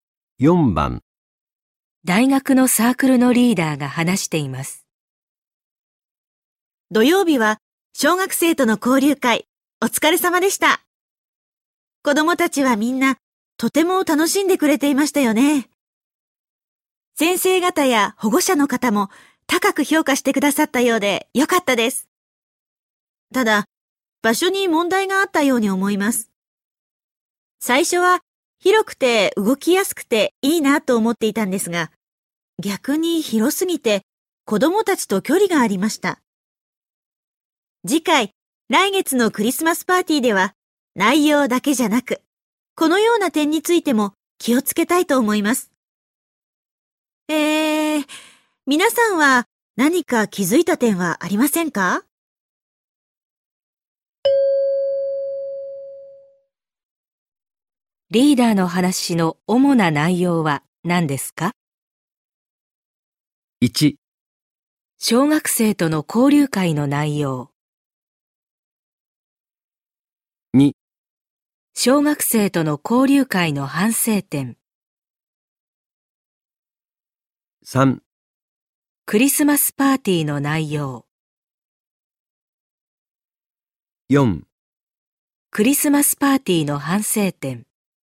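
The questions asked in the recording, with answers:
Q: リーダーの話の主な内容は何ですか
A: 2: 小学生との交流会の反省点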